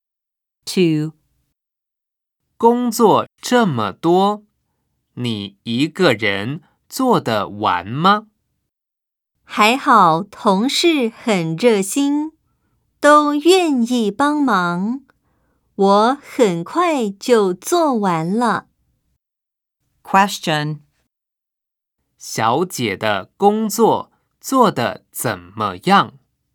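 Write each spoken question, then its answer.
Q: 小姐的工作做得怎么样?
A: 同事帮忙,她很快就做完了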